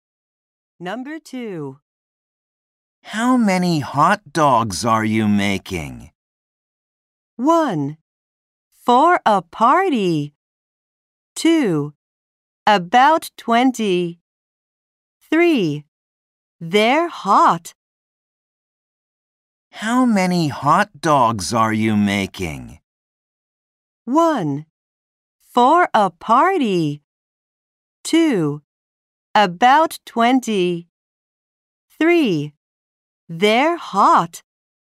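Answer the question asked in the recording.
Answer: 2: About 20.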